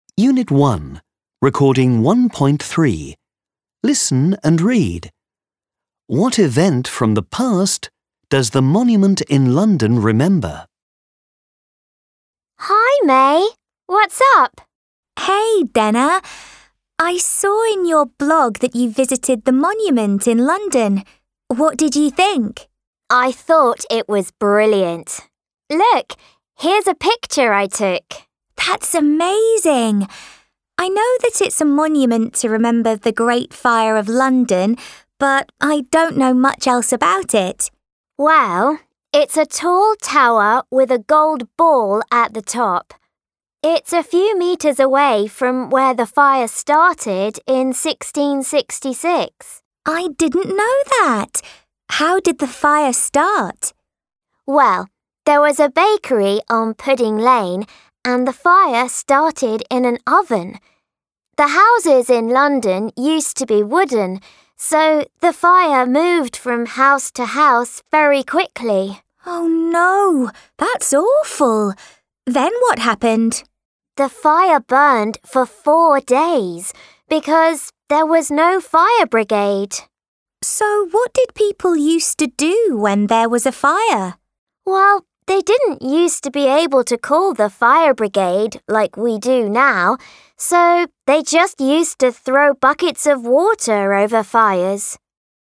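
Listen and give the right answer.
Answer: The Great Fire of London (1666)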